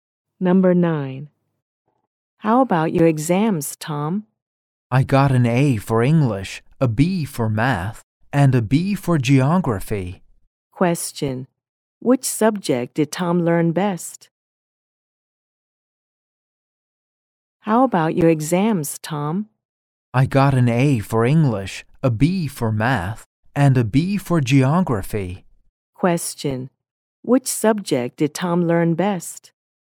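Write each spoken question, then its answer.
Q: Which subject did Tom learn best?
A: English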